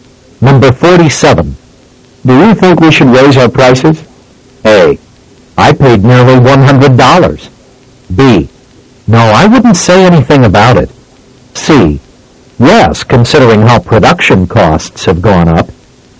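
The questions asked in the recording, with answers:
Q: Do you think we should raise our prices?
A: C: Yes, considering how production costs have gone up.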